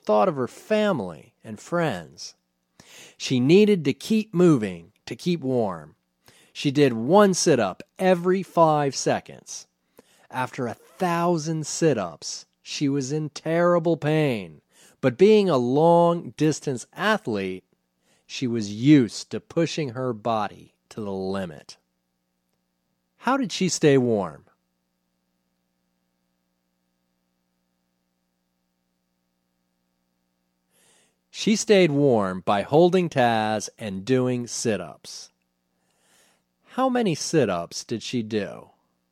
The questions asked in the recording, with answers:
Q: How many sit-ups did she do?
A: She did one sit-up every 5 seconds.